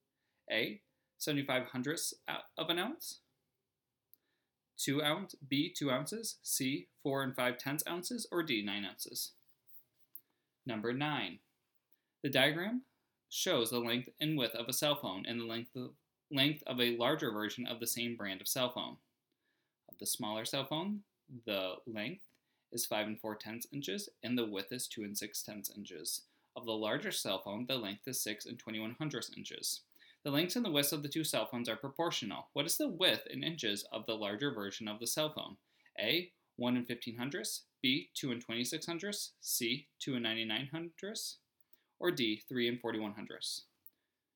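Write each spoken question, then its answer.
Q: What is the width in inches of the larger version of the cell phone?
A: C: 2 99/100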